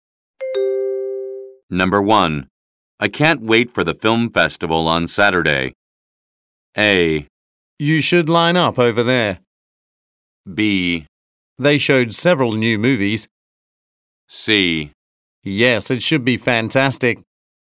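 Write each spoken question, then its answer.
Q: I can't wait for the film festival on Saturday.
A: C: Yes, it should be fantastic.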